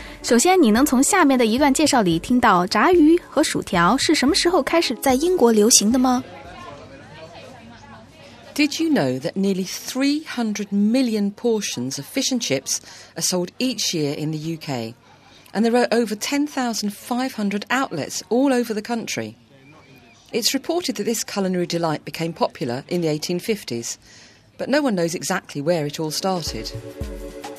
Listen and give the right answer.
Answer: 据说是19世纪中的时候,炸鱼和薯条就成了工人阶级 working class 喜欢的菜肴。